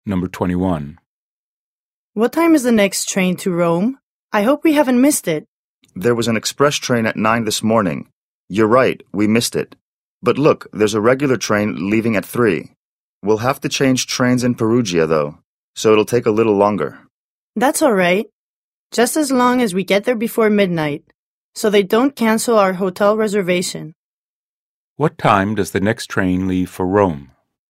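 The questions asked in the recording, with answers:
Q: What time does the next train leave for Rome?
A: At 3 o'clock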